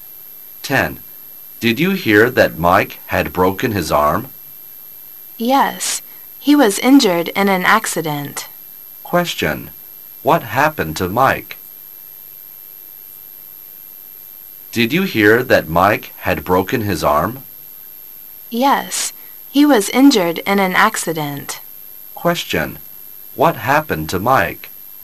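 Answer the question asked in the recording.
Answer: He broke his arm in an accident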